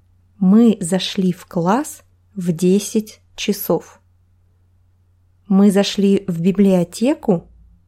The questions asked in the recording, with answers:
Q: Мы зашли в библиотеку?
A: Нет. Не в библиотеку. Мы зашли в класс.